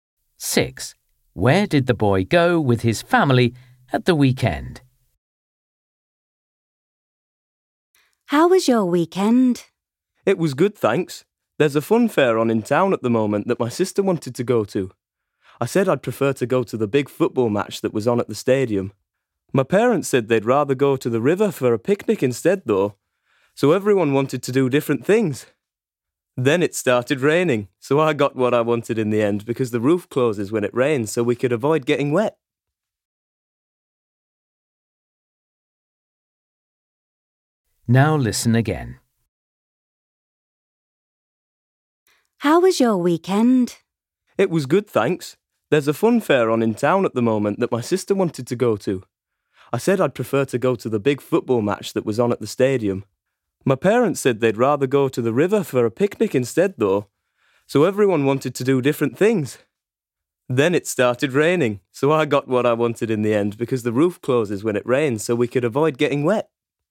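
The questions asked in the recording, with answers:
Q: Where did the boy go with his family at the weekend?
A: to a football match at the stadium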